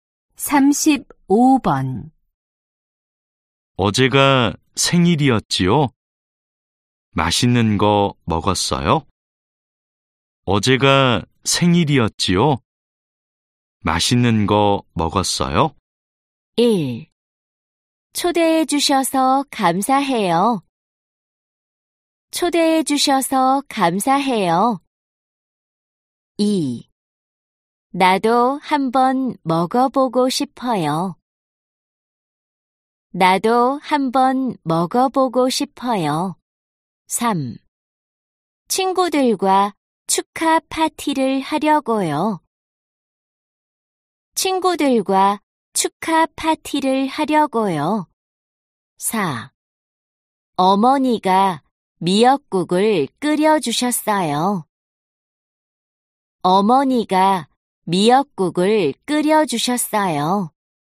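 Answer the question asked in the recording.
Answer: 4: 어머니가 미역국을 끓여주셨어요.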